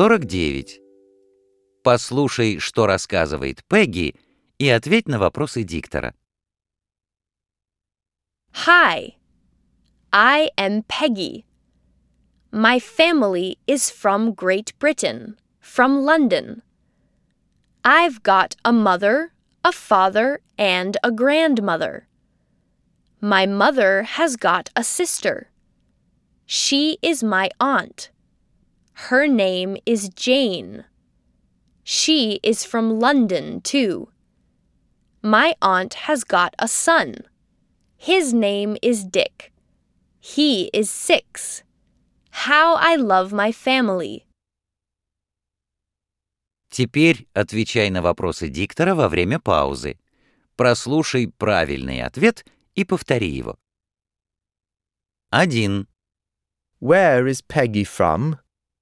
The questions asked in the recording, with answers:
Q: Where is Peggy from?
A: She is from Great Britain.